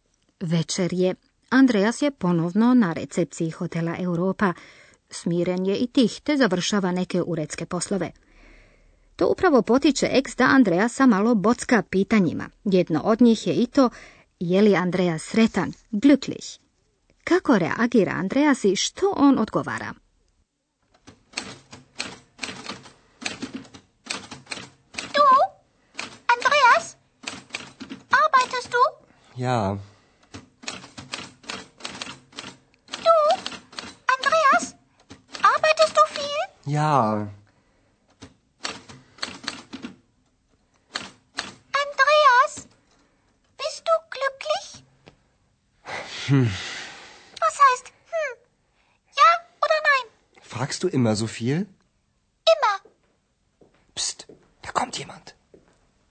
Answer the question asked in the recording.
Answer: Na pitanje koje mu je postavila ex, Andreas neodlučno promrmlja nešto sebi u bradu, te joj jednostavno uzvraća pitanjem.